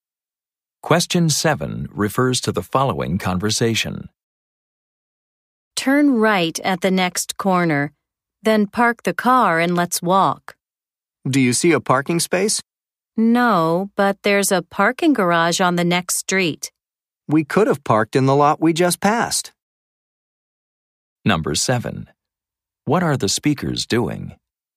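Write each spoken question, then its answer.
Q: What are the speakers doing?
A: Looking for a parking place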